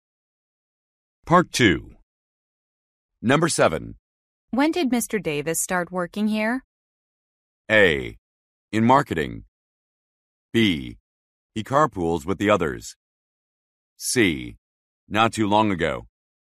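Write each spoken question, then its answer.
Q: When did Mr. Davis start working here?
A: C: Not too long ago.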